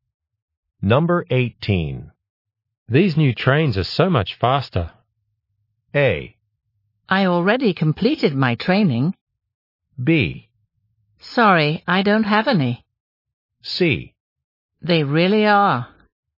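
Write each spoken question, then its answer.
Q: These new trains are so much faster.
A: C: They really are.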